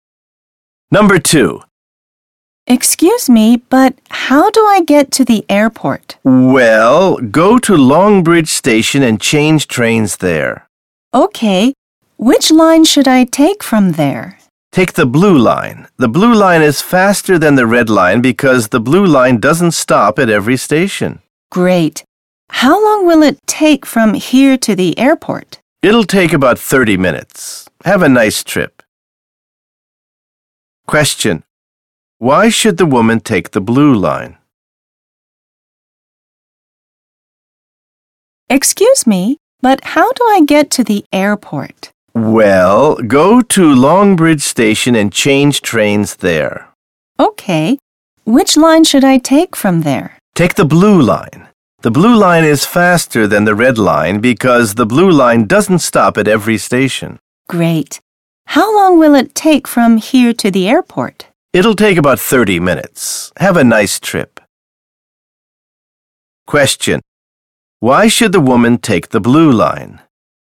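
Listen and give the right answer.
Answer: Because it is faster; it doesn't stop at every station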